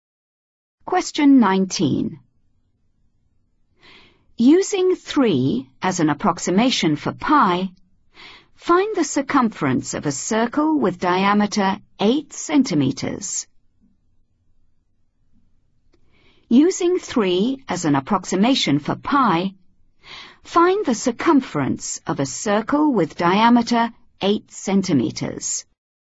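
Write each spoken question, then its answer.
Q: Using 3 as an approximation for pi, find the circumference of a circle with diameter 8 centimeters.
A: 24 cm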